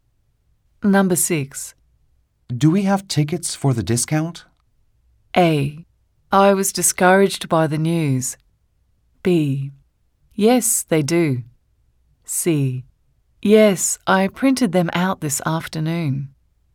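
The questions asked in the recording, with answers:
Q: Do we have tickets for the discount?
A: C: Yes, I printed them out this afternoon.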